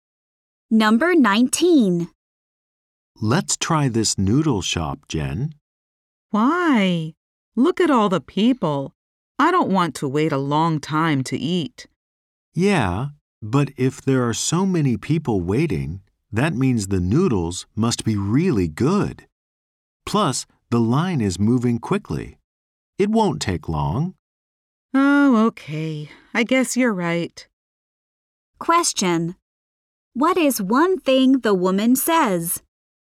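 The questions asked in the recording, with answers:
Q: What is one thing the woman says?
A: She doesn't want to wait a long time to eat.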